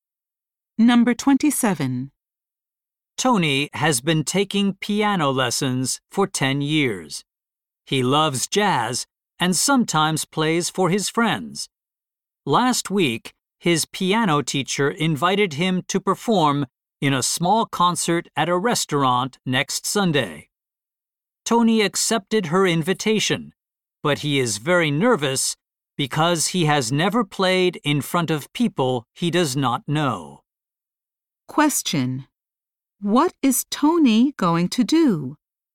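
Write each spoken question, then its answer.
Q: What is Tony going to do?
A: Perform in a small concert at a restaurant next Sunday.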